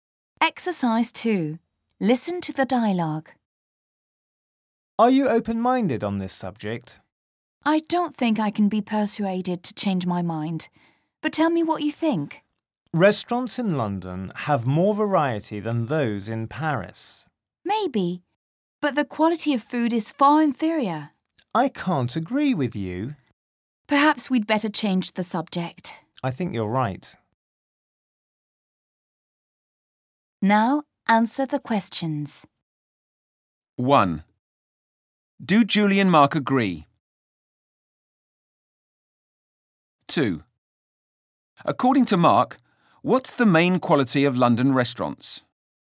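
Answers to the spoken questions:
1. No, they don't agree.
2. They have more variety than those in Paris.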